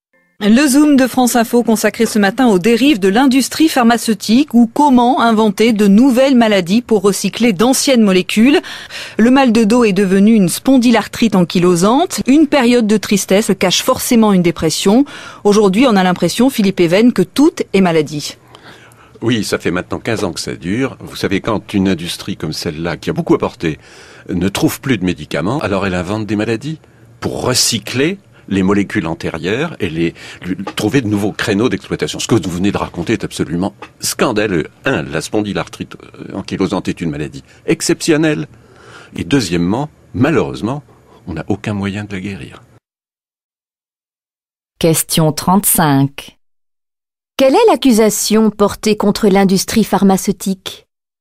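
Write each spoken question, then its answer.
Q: Quelle est l'accusation portée contre l'industrie pharmaceutique ?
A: Elle invente de nouvelles maladies pour recycler d'anciennes molécules.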